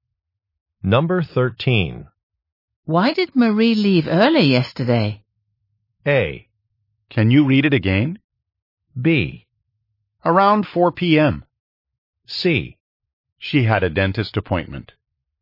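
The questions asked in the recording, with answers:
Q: Why did Marie leave early yesterday?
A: C: She had a dentist appointment.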